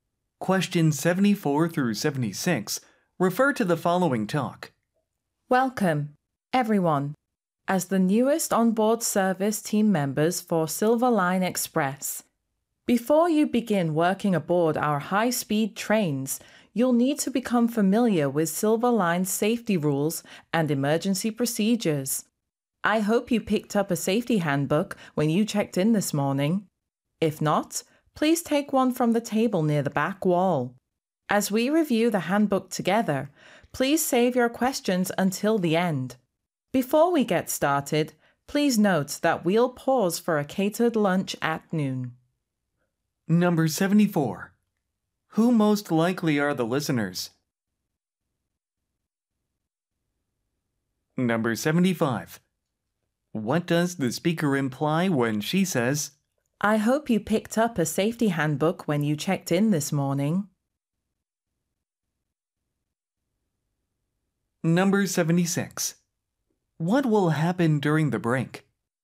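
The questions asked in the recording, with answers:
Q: Who most likely are the listeners?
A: New onboard service team members for a train company

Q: What will happen during the break?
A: A catered lunch will be served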